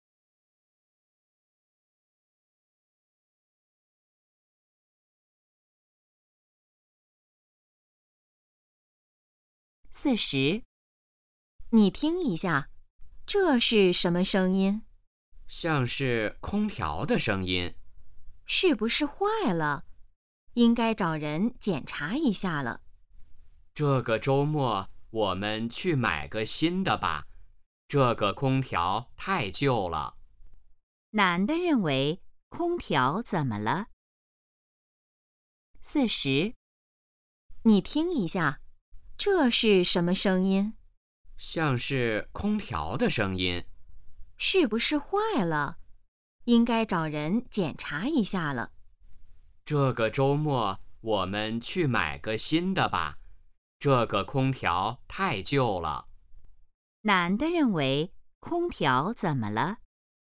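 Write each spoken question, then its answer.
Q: 男的认为空调怎么了?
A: 太旧了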